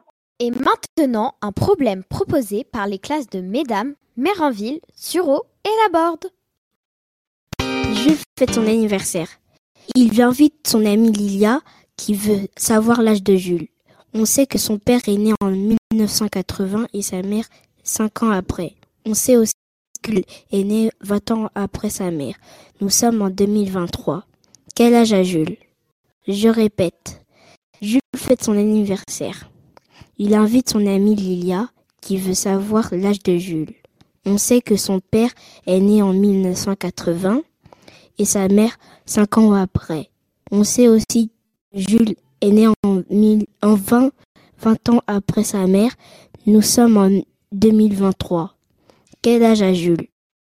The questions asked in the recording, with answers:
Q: Nous sommes en 2023. Quel âge a Jules?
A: C'est la bonne réponse, c'est 18 ans.